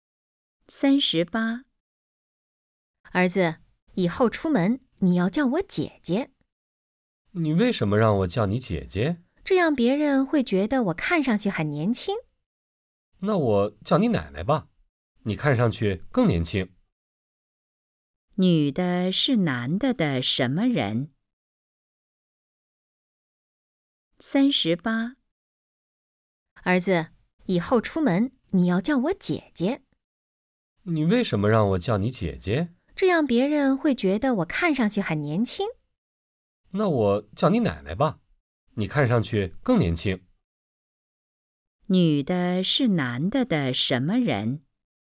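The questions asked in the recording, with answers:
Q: 女的是男的的什么人?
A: 妈妈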